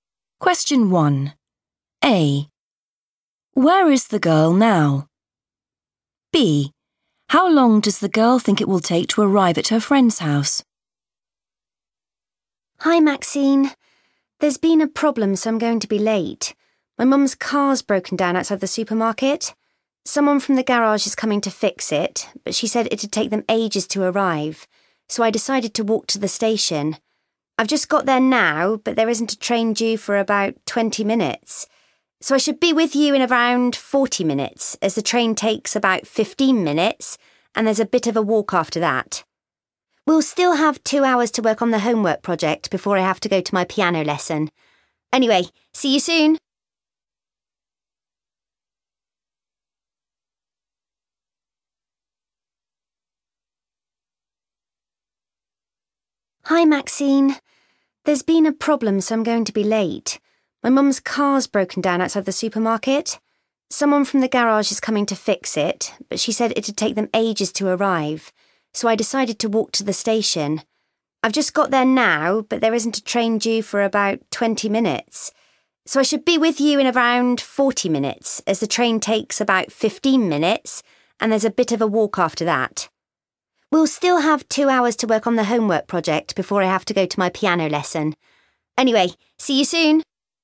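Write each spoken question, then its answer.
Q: Where is the girl now?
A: at the station

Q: How long does the girl think it will take to arrive at her friend's house?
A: around 40 minutes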